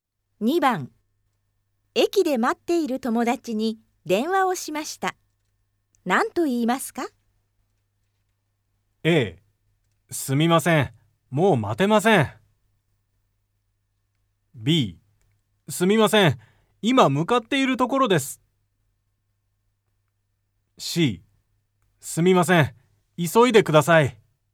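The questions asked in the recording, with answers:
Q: 駅で待っている友達に電話をしました。何と言いますか?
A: B: すみません。今向かっているところです。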